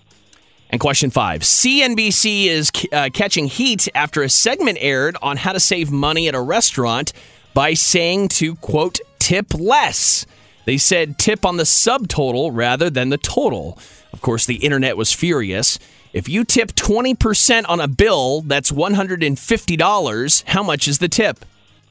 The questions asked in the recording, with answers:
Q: How much is the tip?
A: $30.